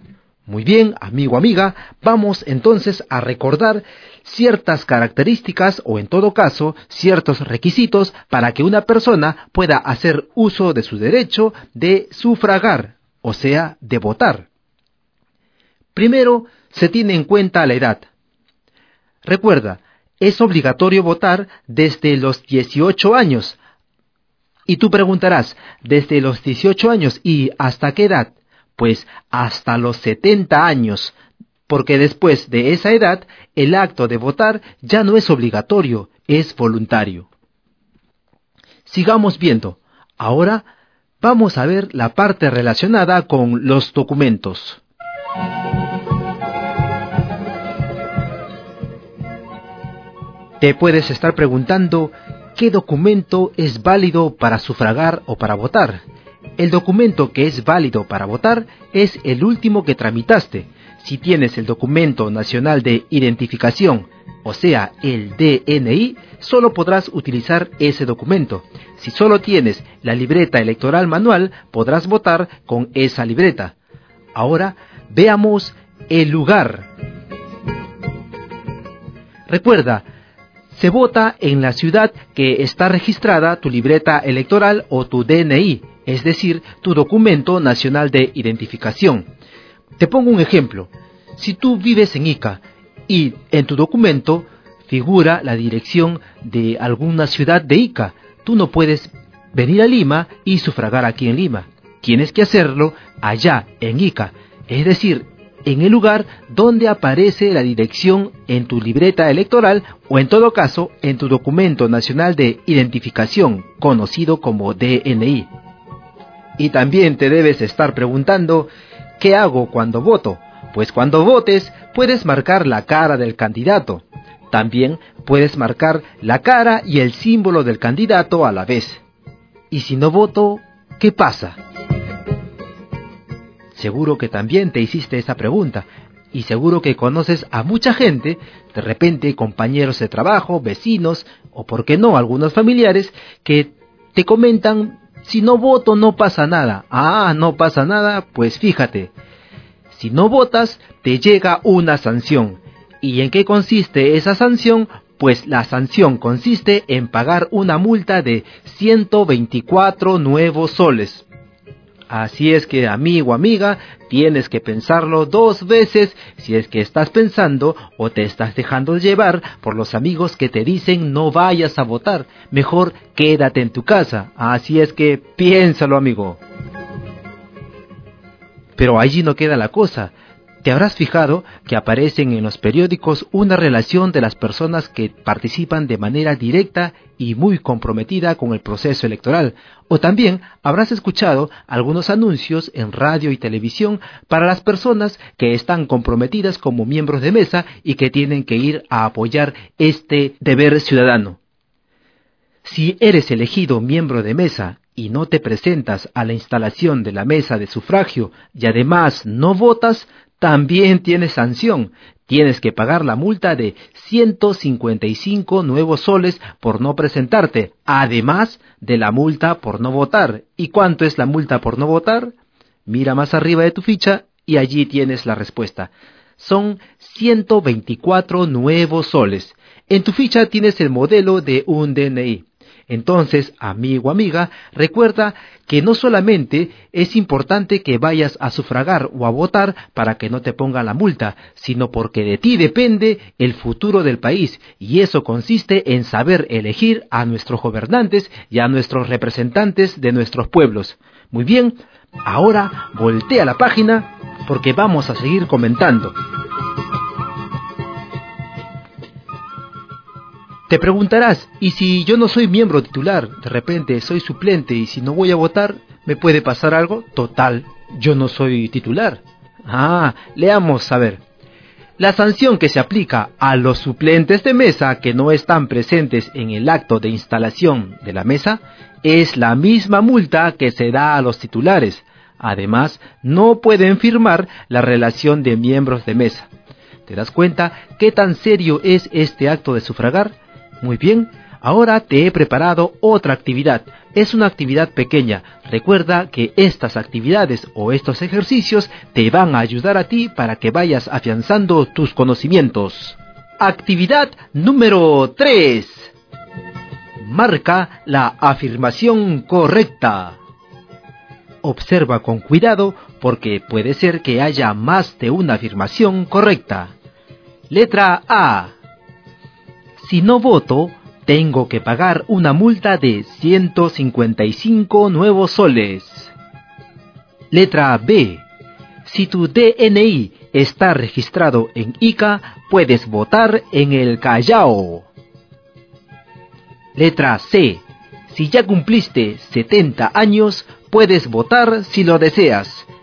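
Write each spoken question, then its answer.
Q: Actividad número 3. Marca la afirmación correcta.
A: C: Si ya cumpliste 70 años, puedes votar si lo deseas.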